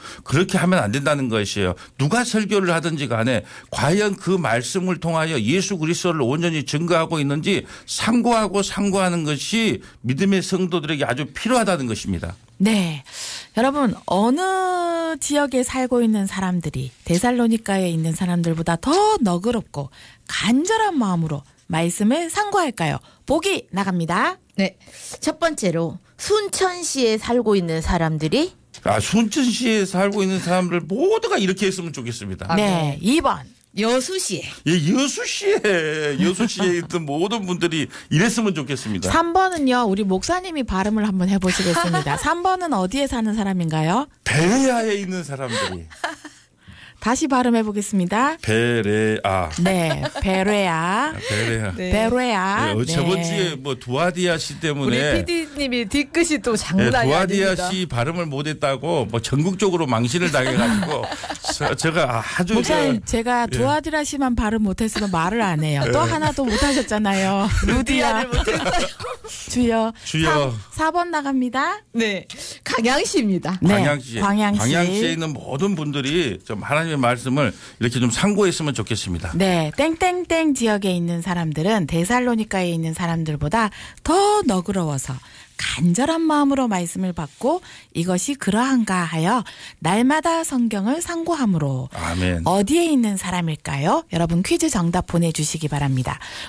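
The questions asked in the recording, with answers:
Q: 여러분, 어느 지역에 살고 있는 사람들이 데살로니카에 있는 사람들보다 더 너그럽고 간절한 마음으로 말씀을 상고할까요?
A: 3: 베레아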